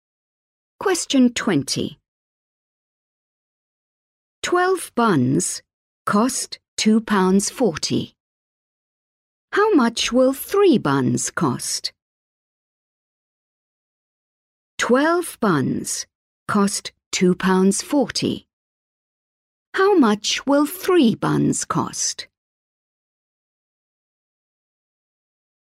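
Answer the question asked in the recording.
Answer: 60p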